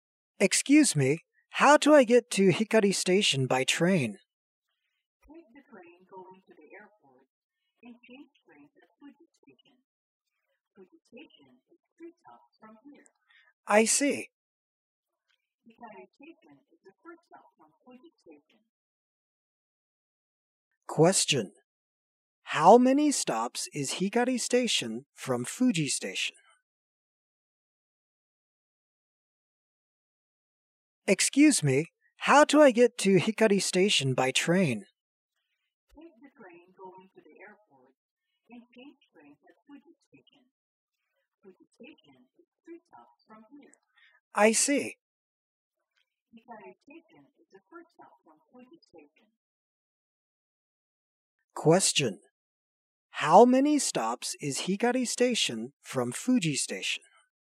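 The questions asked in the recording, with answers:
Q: How many stops is Hikari Station from Fuji Station?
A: One stop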